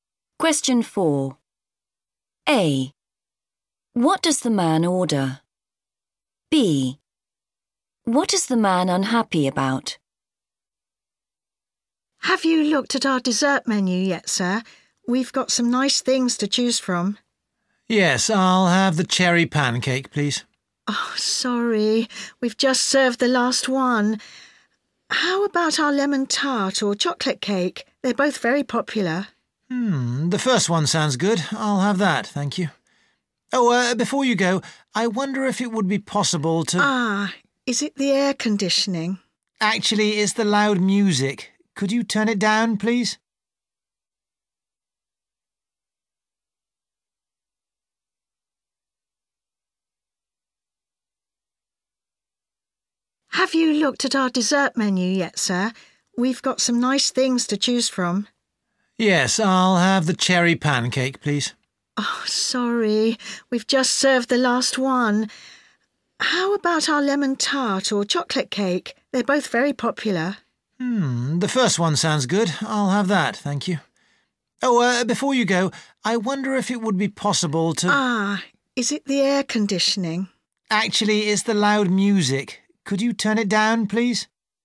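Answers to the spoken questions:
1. Lemon tart
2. The loud music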